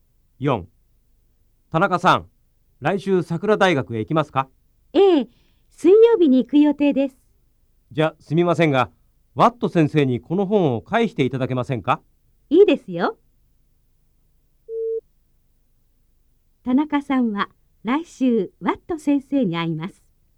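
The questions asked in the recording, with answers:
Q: 田中さんは来週ワット先生に会います。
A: ○(正しい)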